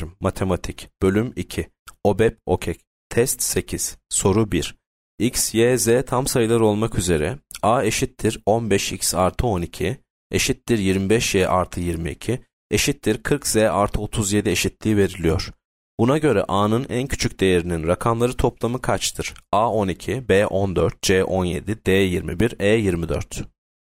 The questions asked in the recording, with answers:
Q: Buna göre A'nın en küçük değerinin rakamları toplamı kaçtır?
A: Yanıt D 21.